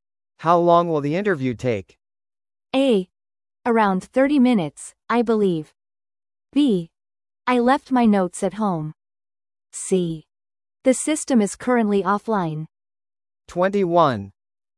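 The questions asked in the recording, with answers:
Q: How long will the interview take?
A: A: Around 30 minutes, I believe.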